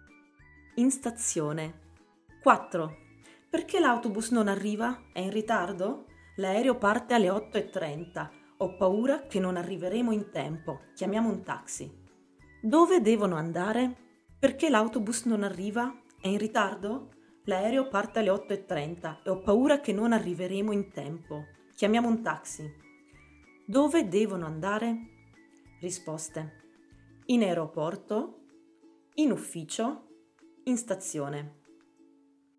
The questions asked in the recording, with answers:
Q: Dove devono andare?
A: In aeroporto, giusto.